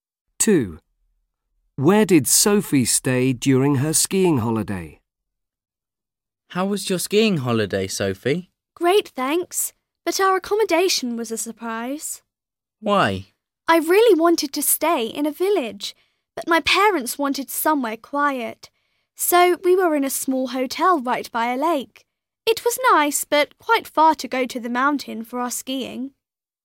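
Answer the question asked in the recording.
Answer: In a small hotel by a lake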